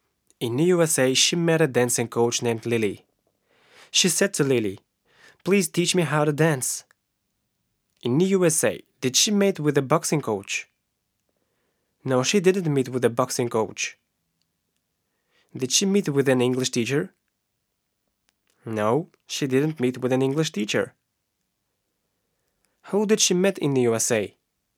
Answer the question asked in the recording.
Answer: She met with a dancing coach.